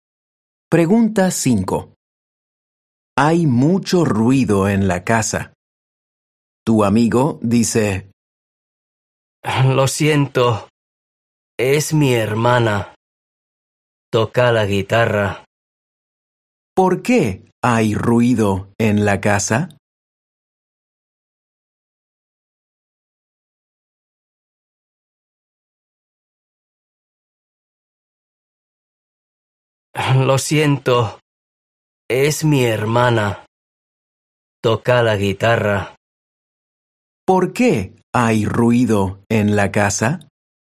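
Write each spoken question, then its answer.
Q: ¿Por qué hay ruido en la casa?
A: Su hermana toca la guitarra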